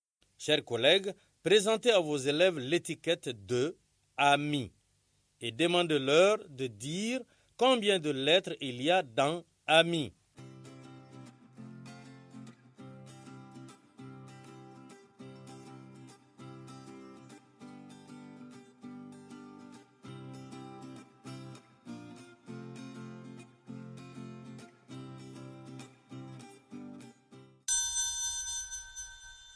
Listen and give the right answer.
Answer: J'espère que vous avez dit qu'il y a trois lettres dans le mot « ami ».